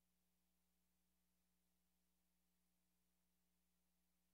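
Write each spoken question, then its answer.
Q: What does the woman mean?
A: She doesn't want the dinner special.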